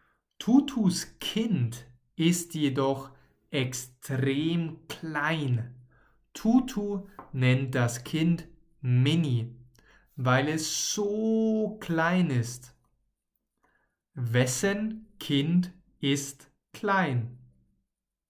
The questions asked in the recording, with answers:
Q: Wessen Kind ist klein?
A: Tutus Kind. Tutus Kind ist klein.